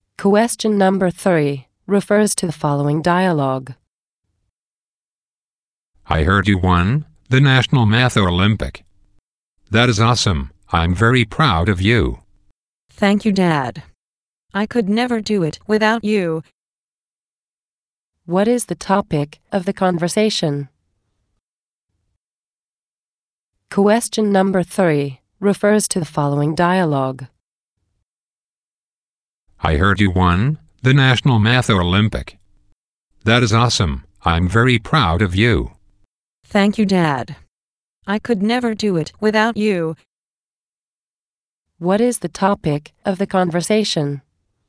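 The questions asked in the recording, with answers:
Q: What is the topic of the conversation?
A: Winning the National Math Olympiad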